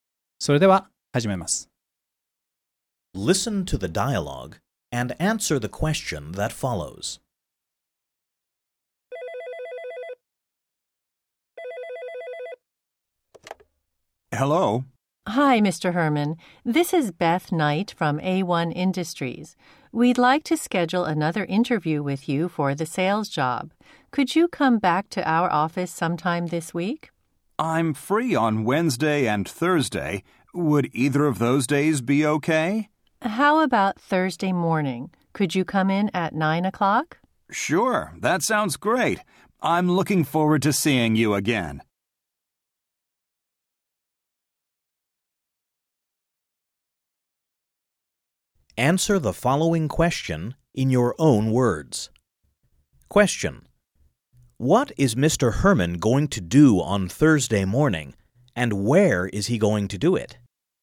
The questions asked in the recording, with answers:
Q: What is Mr. Herman going to do on Thursday morning, and where is he going to do it?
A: He is going to be interviewed for the sales job at the office of A1 Industries.